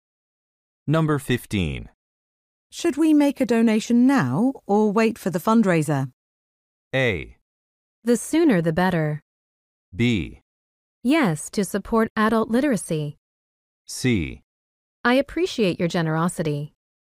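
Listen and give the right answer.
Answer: A: The sooner the better.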